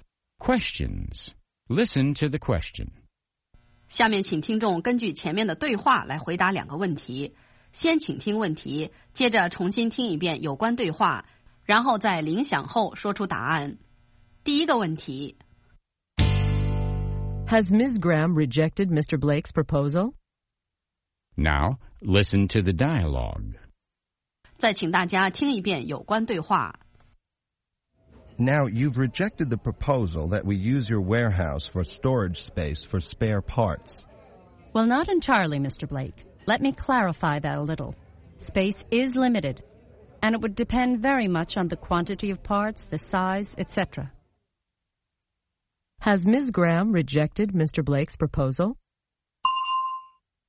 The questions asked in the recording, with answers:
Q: Has Ms. Graham rejected Mr. Blake's proposal?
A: No, she hasn't. She is still willing to consider it.